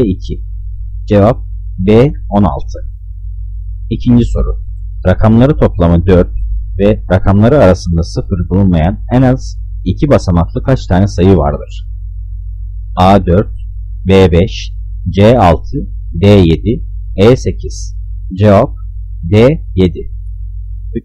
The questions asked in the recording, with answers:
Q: Rakamları toplamı 4 ve rakamları arasında 0 bulunmayan en az 2 basamaklı kaç tane sayı vardır?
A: Cevap D 7.